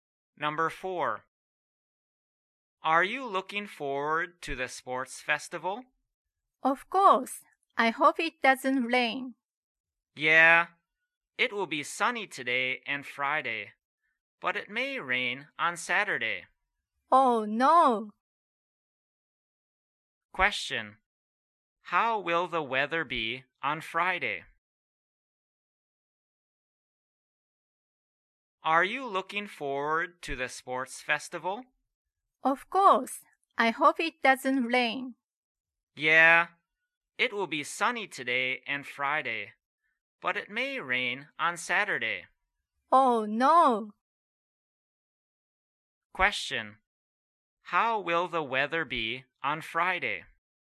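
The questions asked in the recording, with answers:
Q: How will the weather be on Friday?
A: Sunny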